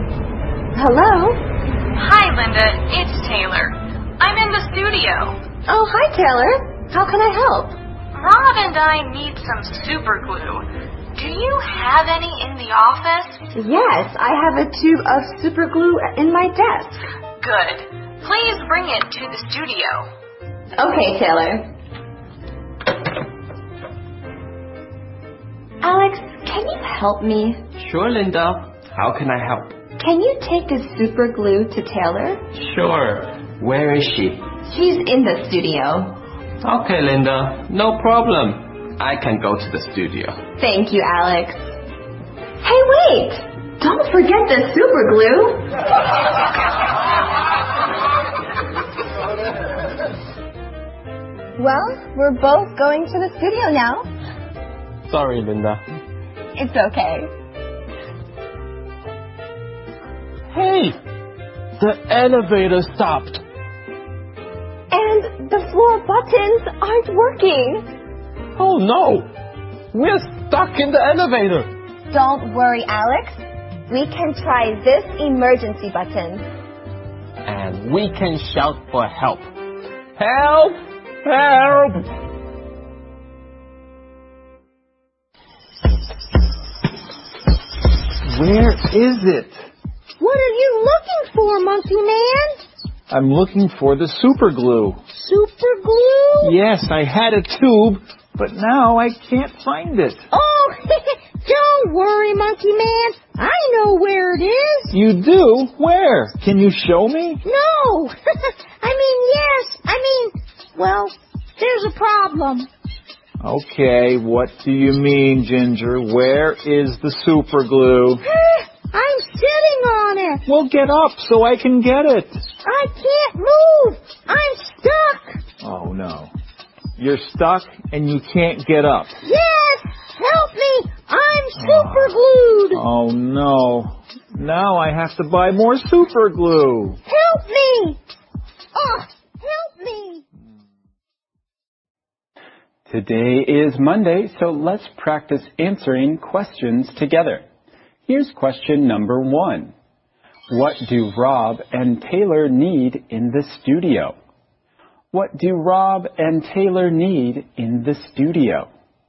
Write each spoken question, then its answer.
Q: What do Rob and Taylor need in the studio?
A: Rob and Taylor need some super glue.